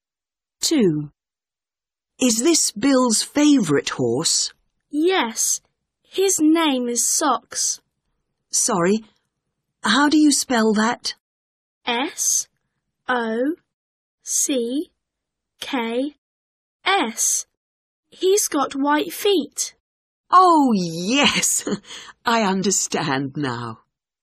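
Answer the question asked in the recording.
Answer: Socks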